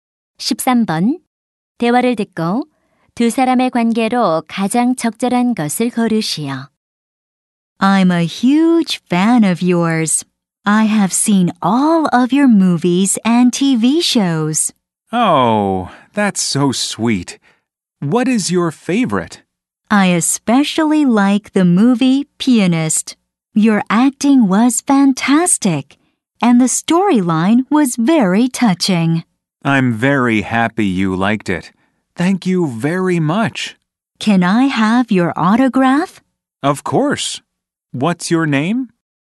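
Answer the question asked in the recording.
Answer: 팬 - 배우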